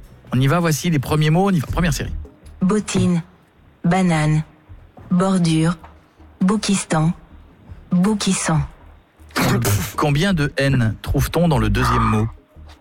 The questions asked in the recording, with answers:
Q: Combien de N trouve-t-on dans le deuxième mot?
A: Deux.